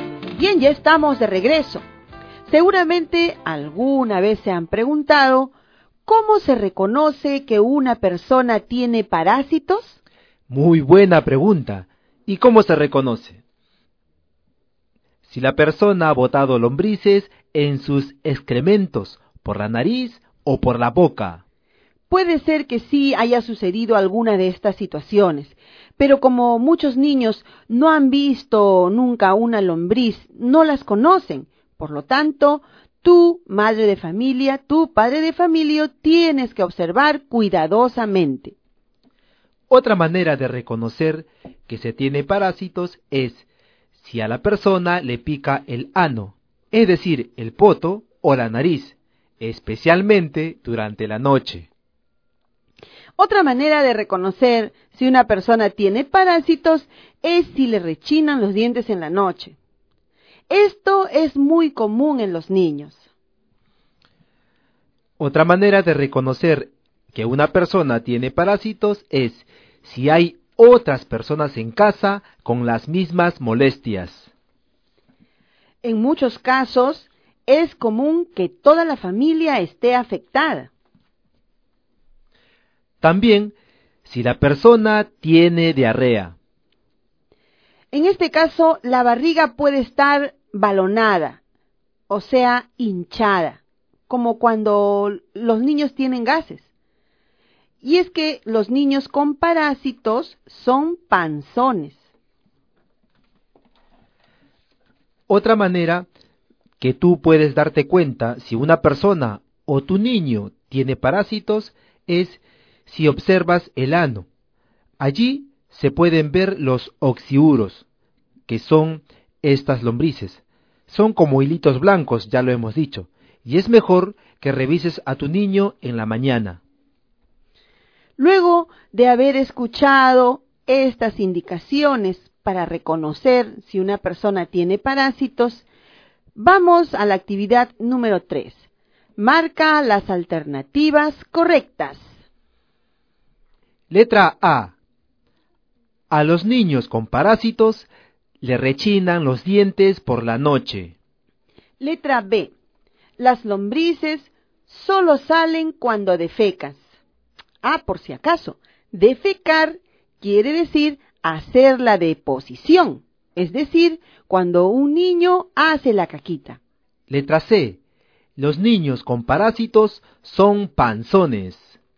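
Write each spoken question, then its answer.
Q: Letra A. A los niños con parásitos le rechinan los dientes por la noche.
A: Correcta

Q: Letra B. Las lombrices solo salen cuando defecas.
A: Incorrecta

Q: Letra C. Los niños con parásitos son panzones.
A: Correcta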